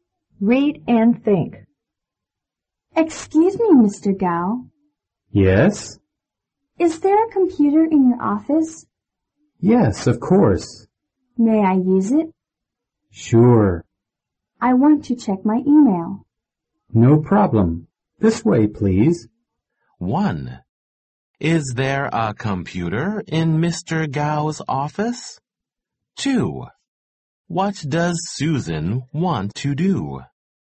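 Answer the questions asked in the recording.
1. Yes, there is.
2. She wants to check her email.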